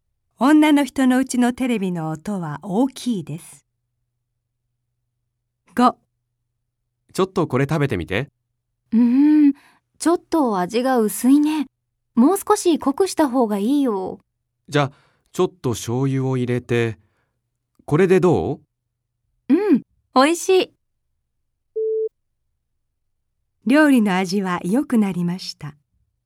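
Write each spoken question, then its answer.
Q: 料理の味は良くなりました。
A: ○(正しい)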